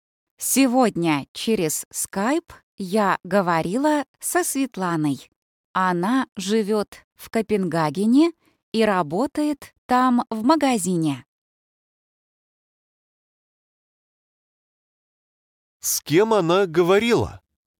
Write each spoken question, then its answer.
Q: С кем она говорила?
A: Со Светланой.